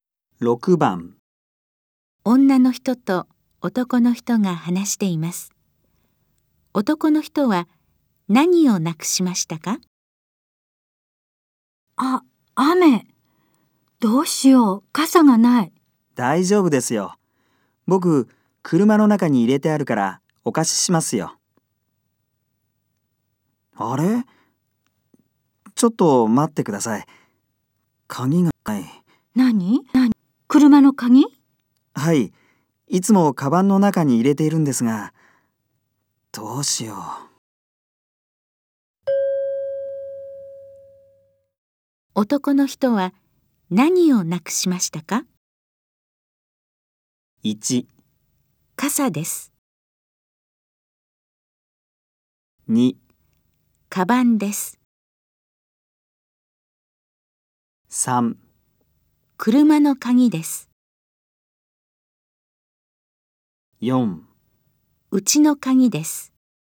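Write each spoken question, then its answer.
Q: 男の人は何をなくしましたか?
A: 3: 車の鍵です。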